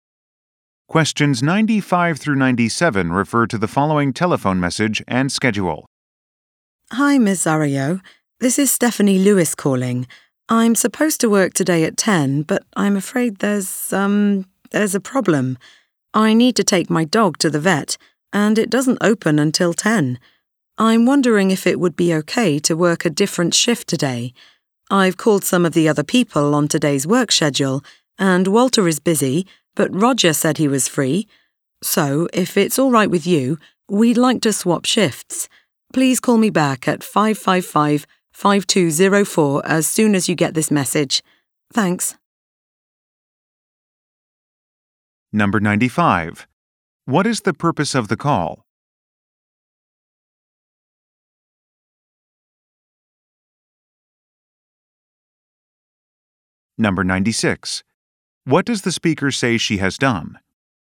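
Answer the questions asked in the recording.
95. To ask to work a different shift today
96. Called other coworkers on the schedule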